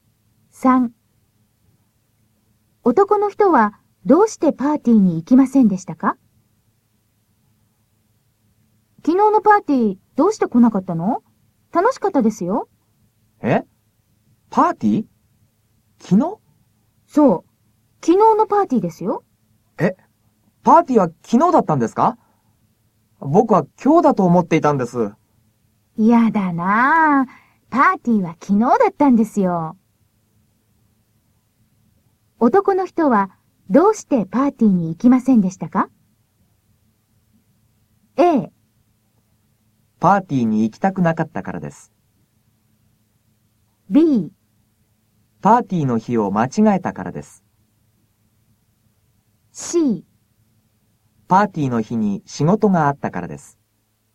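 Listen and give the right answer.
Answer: B: パーティーの日を間違えたからです。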